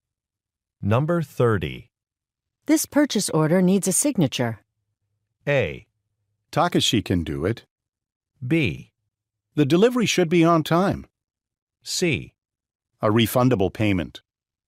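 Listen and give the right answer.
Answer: A: Takashi can do it.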